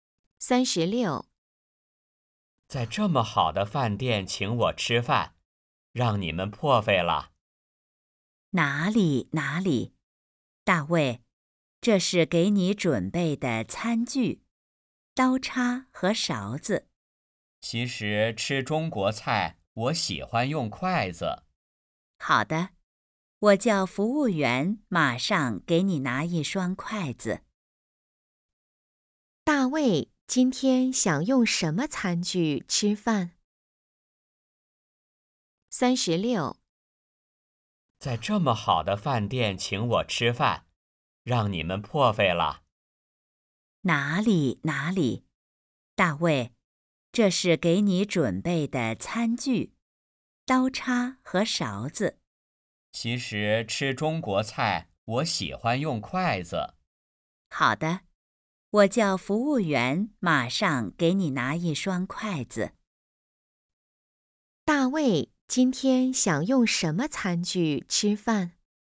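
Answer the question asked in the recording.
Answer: 筷子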